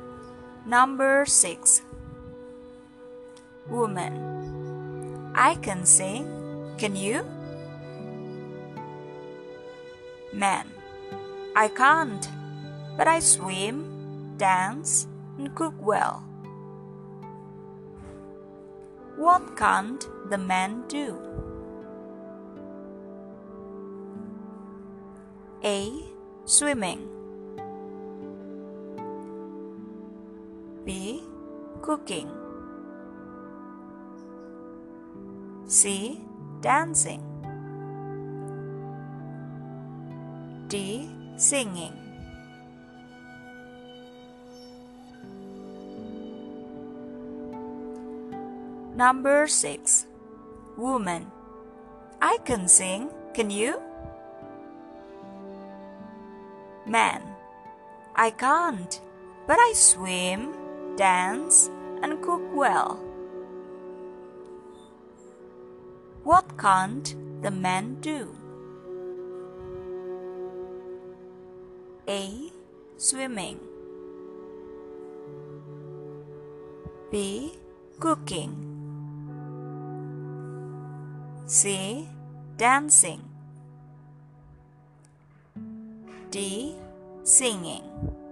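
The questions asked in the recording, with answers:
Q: What can't the man do?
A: D: Singing.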